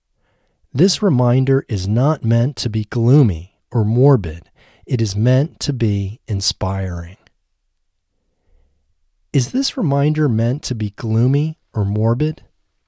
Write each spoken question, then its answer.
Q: Is this reminder meant to be gloomy or morbid?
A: No, this reminder isn't meant to be gloomy or morbid.